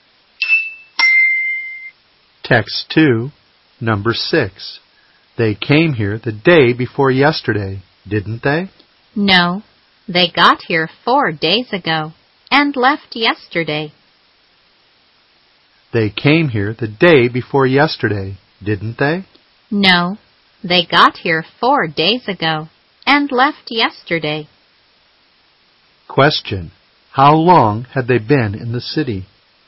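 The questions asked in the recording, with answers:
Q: how long had they been in the city?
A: About three days (they arrived 4 days ago and left yesterday)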